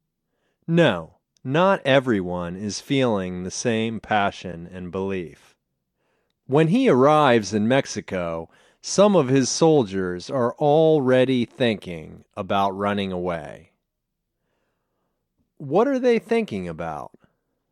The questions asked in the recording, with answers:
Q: What are they thinking about?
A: They are thinking about running away.